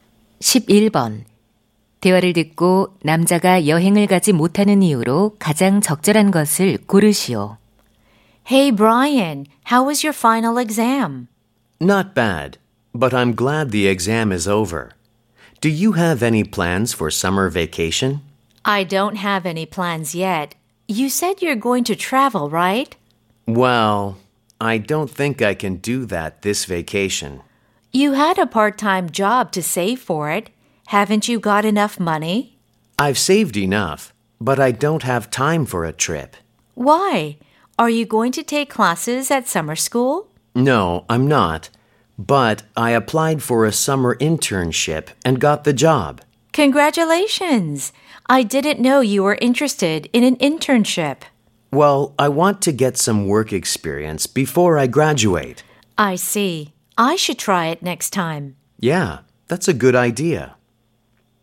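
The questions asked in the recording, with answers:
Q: 대화를 듣고 남자가 여행을 가지 못하는 이유로 가장 적절한 것을 고르시오.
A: 여름 인턴십을 하게 되어서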